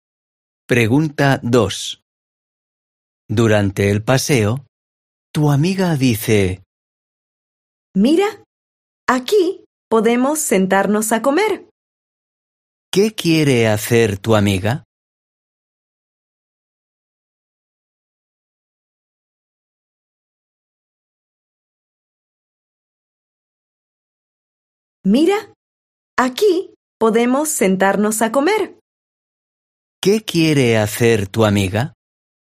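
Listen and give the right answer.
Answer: sentarse a comer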